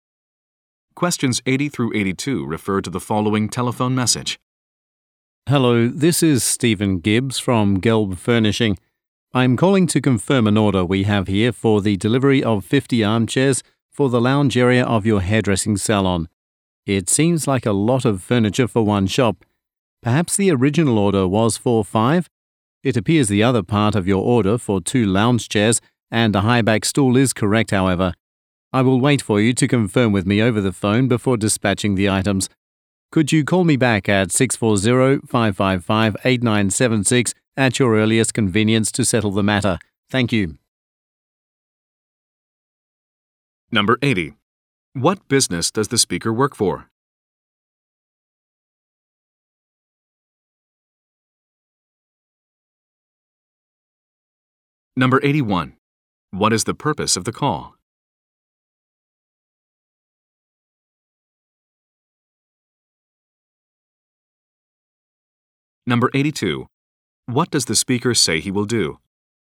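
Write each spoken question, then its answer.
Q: What business does the speaker work for?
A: A furniture company (Gelb Furnishing)

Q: What is the purpose of the call?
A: To confirm an order that may be wrong (50 armchairs)

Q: What does the speaker say he will do?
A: Wait for confirmation by phone before dispatching the items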